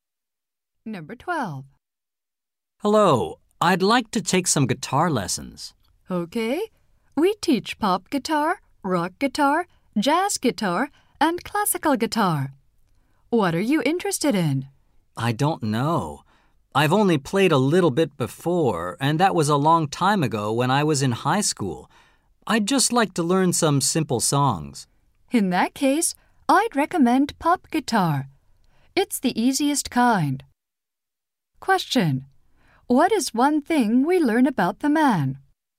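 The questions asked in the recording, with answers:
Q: What is one thing we learn about the man?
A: He played guitar a little in high school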